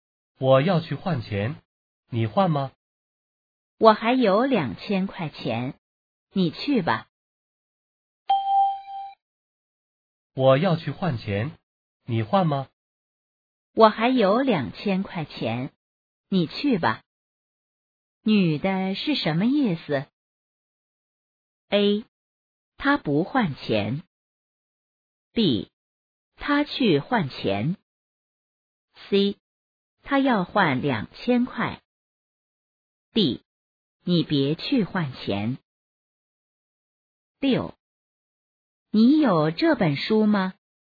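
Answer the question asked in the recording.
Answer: A: 她不换钱。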